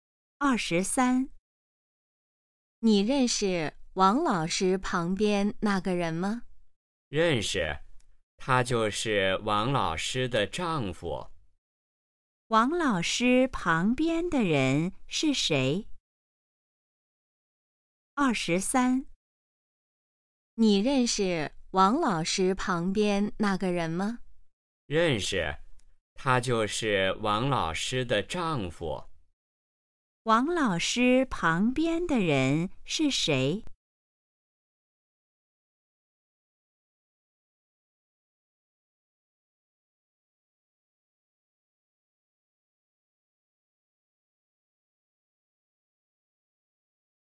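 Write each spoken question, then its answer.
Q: 王老师旁边的人是谁?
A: 王老师的丈夫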